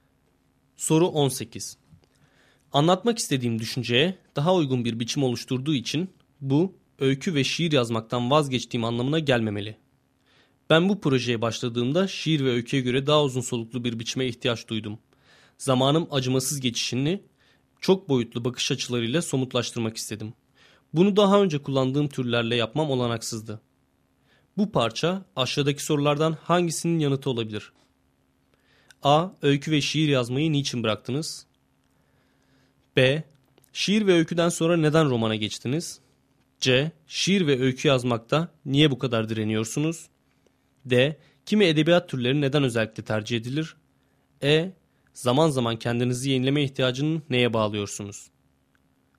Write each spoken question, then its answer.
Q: Bu parça aşağıdaki sorulardan hangisinin yanıtı olabilir?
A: Doğru cevap B şıkkı.